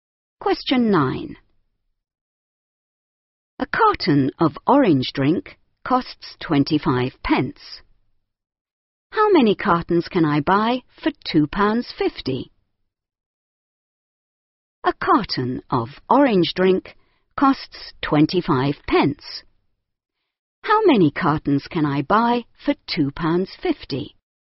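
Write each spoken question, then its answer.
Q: How many cartons can I buy for £2.50?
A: 10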